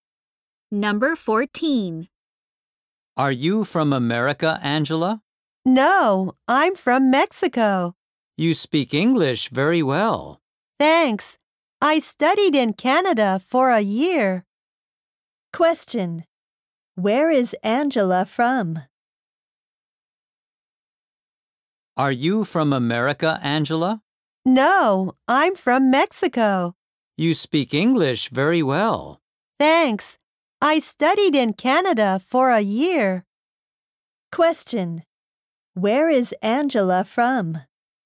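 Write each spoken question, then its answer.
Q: Where is Angela from?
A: Mexico.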